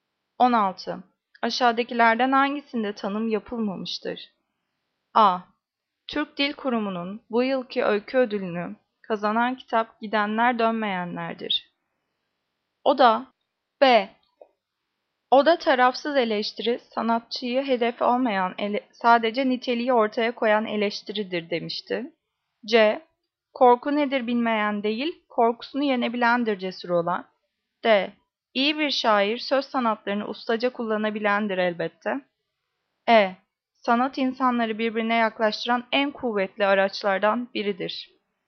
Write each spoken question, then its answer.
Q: Aşağıdakilerden hangisinde tanım yapılmamıştır?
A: Cevap A. Türk Dil Kurumu'nun bu yılki öykü ödülünü kazanan kitap Gidenler Dönmeyenler'dir.